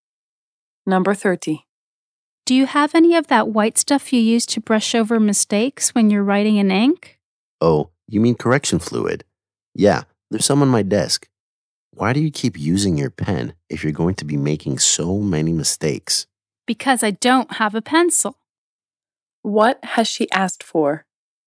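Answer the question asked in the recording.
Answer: Correction fluid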